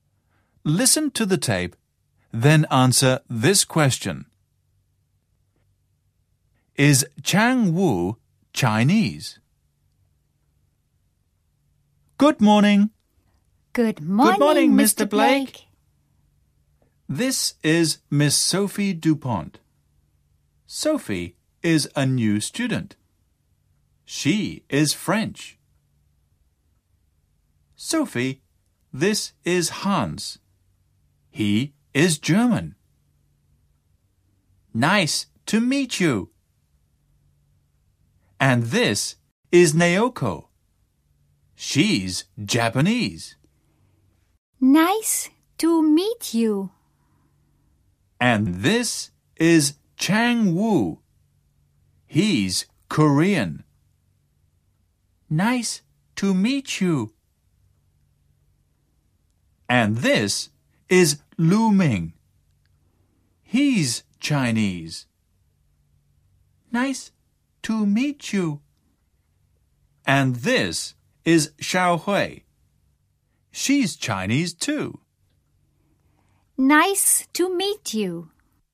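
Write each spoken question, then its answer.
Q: Is Chang Wu Chinese?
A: No, he isn't. He's Korean.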